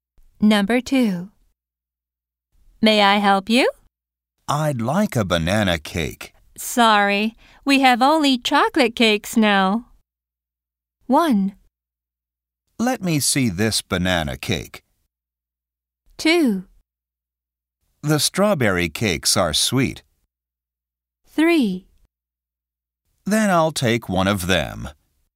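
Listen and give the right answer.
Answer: 3: Then I'll take one of them.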